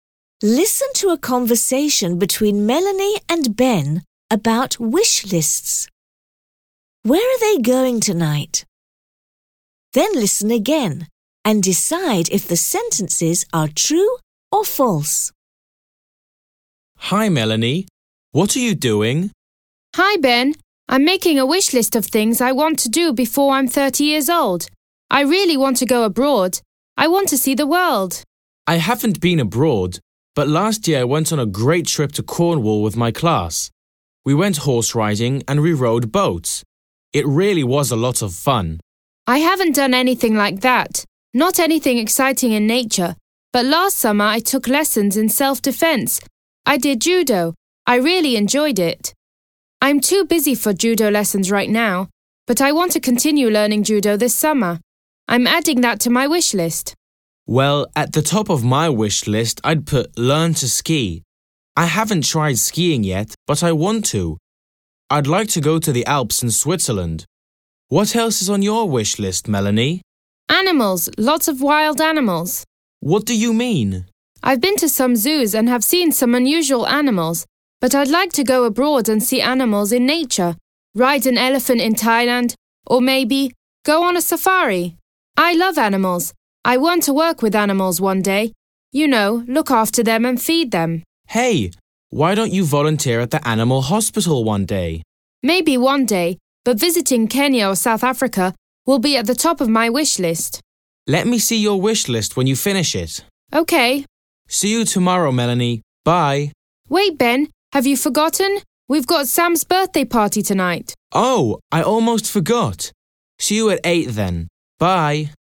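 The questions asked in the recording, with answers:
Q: Where are they going tonight?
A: To Sam's birthday party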